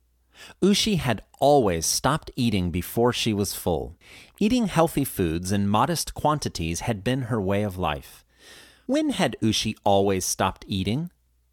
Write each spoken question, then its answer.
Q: When had Ushi always stopped eating?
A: She had always stopped eating before she was full.